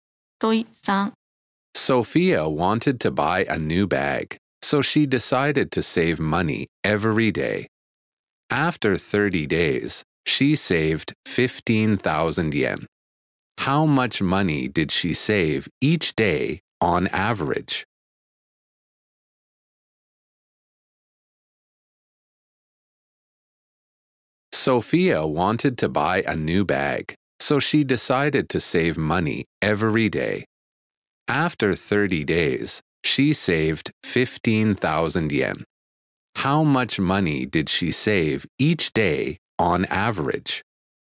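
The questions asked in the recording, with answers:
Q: How much money did she save each day on average?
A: 500 yen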